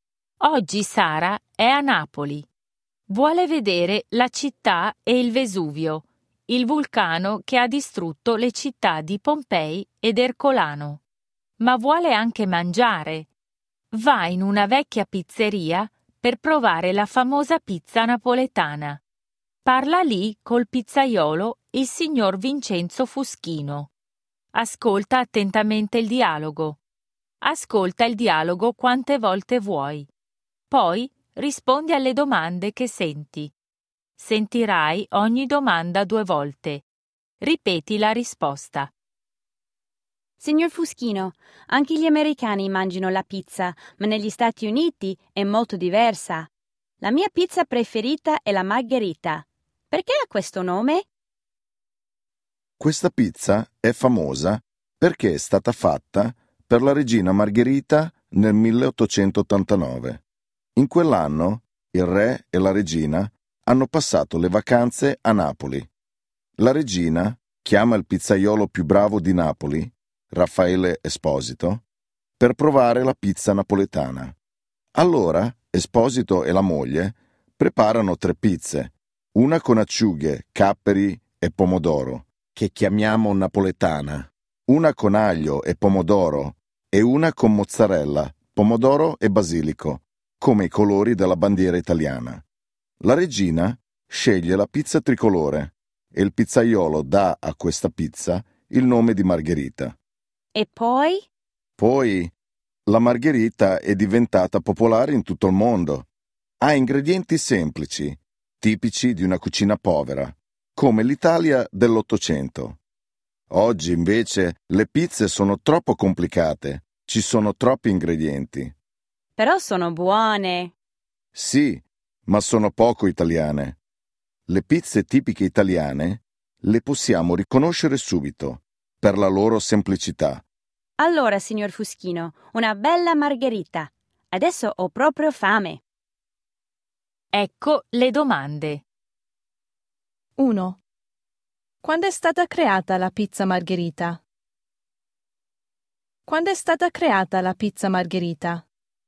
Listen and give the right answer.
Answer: È stata creata nel 1889.